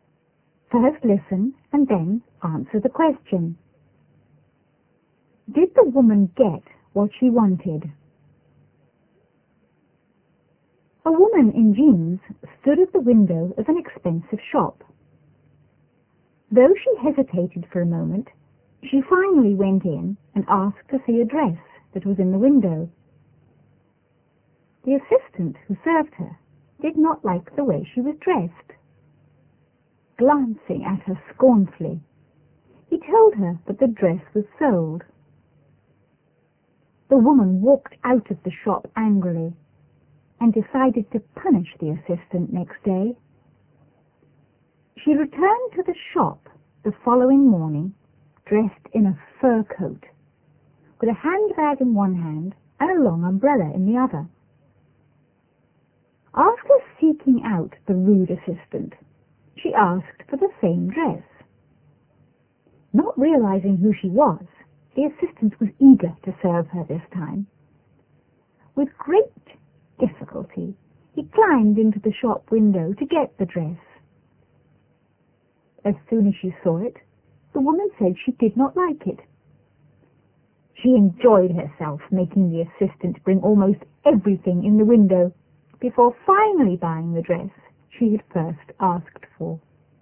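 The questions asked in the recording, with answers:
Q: Did the woman get what she wanted?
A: Yes, she finally bought the dress she had first asked for.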